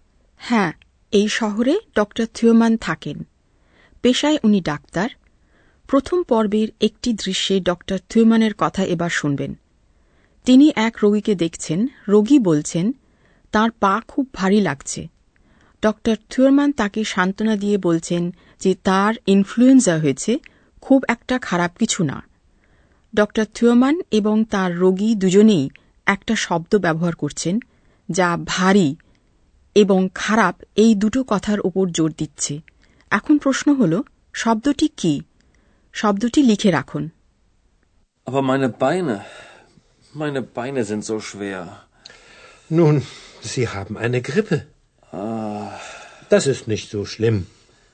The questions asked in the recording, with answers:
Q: শব্দটি কি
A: শেষের শব্দটি হল জো খুব